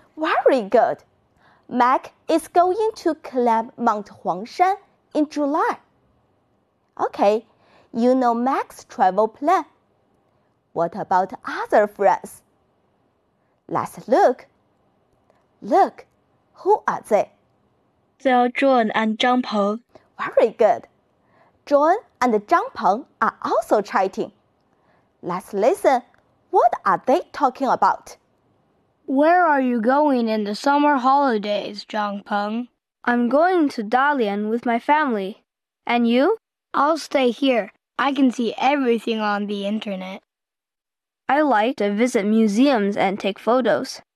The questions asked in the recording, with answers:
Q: What are they talking about?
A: They are talking about Zhang Peng's travel.